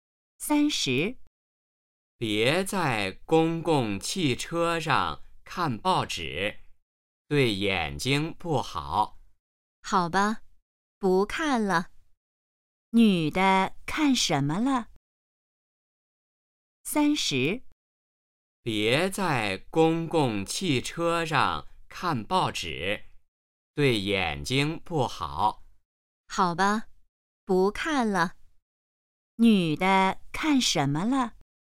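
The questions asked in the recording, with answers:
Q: 女的看什么了?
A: 报纸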